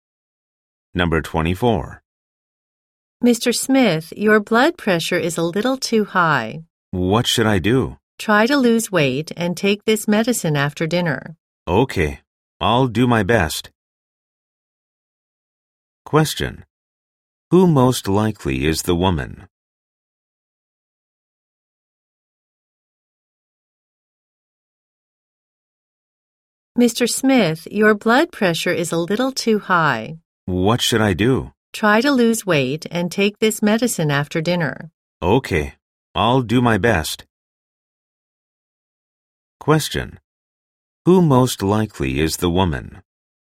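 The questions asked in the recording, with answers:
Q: Who most likely is the woman?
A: A doctor.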